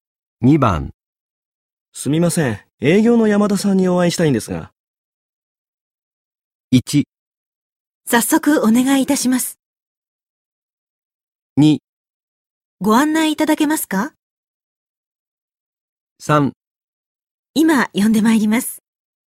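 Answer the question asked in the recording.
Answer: 3: 今呼んでまいります。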